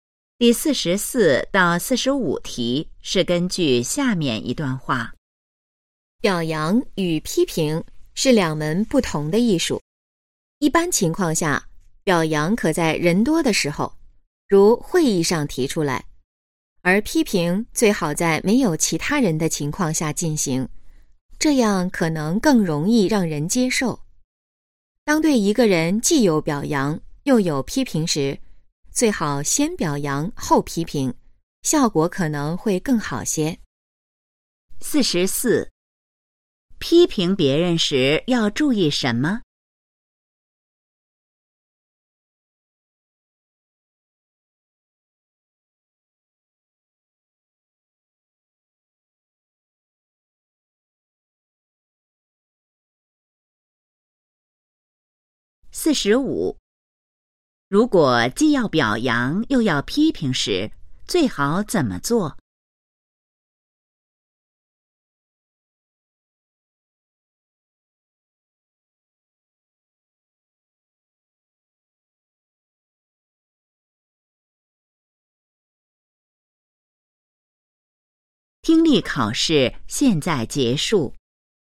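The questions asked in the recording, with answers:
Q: 如果既要表扬又要批评时,最好怎么做?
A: 先表扬后批评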